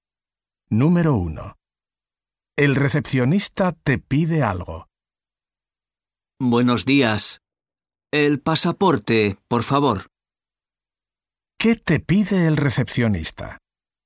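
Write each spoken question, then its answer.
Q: ¿Qué te pide el recepcionista?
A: El pasaporte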